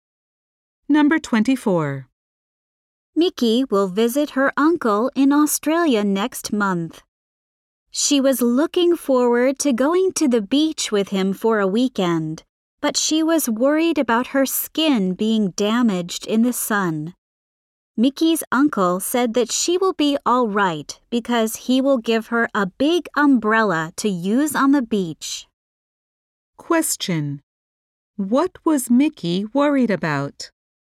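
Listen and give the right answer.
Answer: Her skin being damaged by the sun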